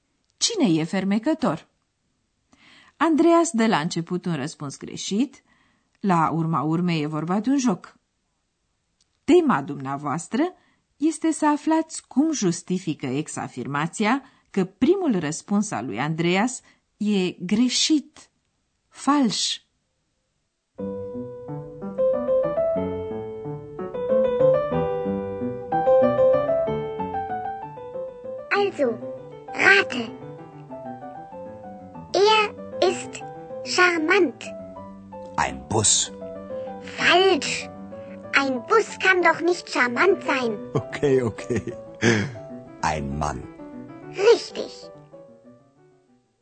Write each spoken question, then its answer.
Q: Tema dumneavoastră este să aflați cum justifică ex-afirmația că primul răspuns al lui Andreas e greșit, fals.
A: Un autobuz nu poate fi fermecător.